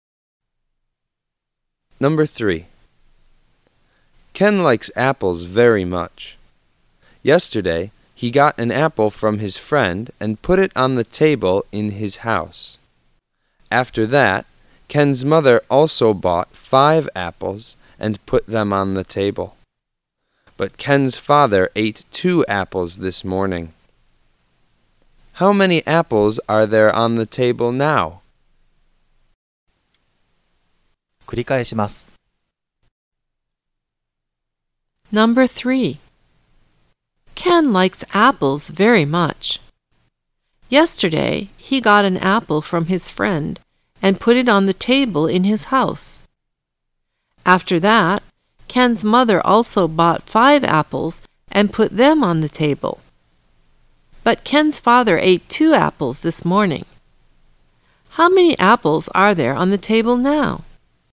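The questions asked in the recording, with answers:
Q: How many apples are there on the table now?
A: Four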